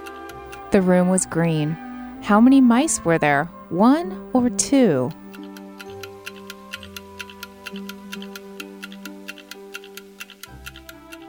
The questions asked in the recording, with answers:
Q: How many mice were there?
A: There was one little mouse.